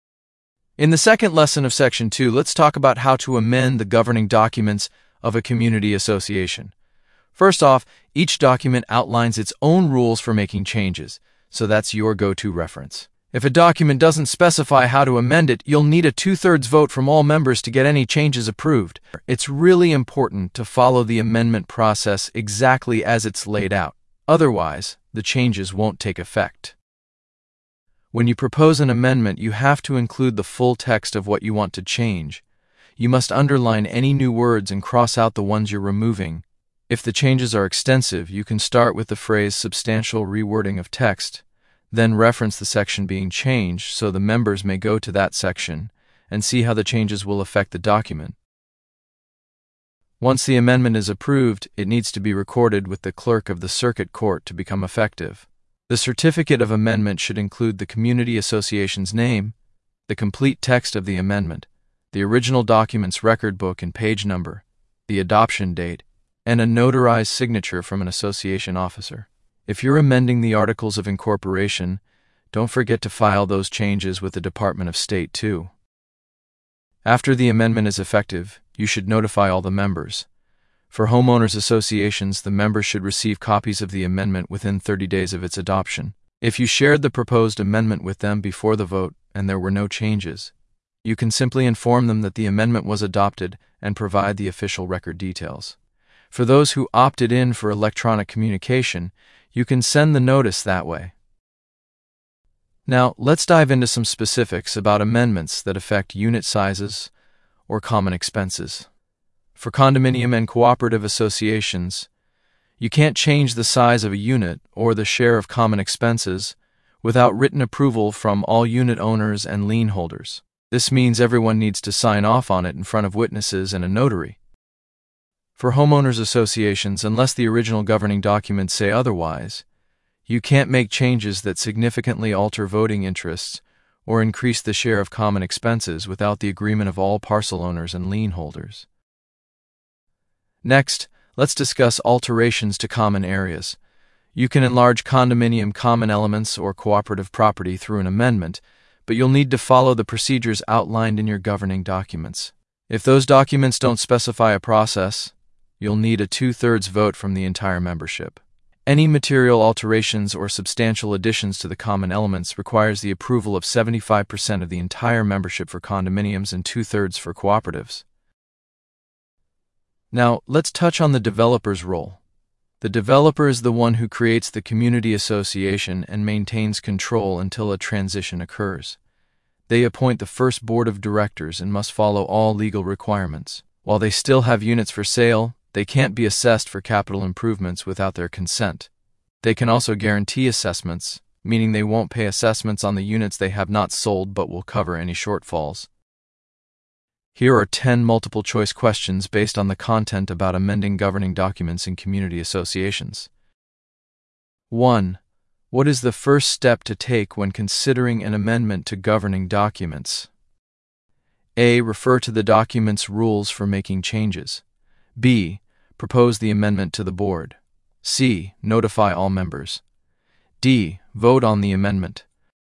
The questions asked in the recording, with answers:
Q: What is the first step to take when considering an amendment to governing documents?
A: The correct answer is A. The first step to take when considering an amendment to governing documents is to refer to the document's rules for making changes.